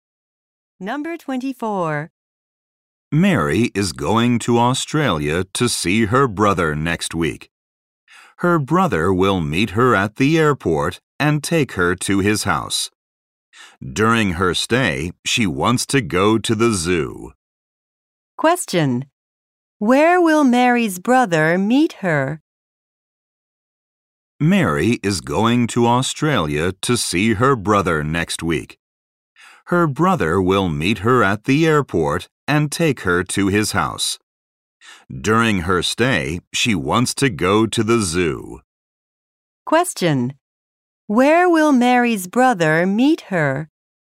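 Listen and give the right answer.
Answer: At the airport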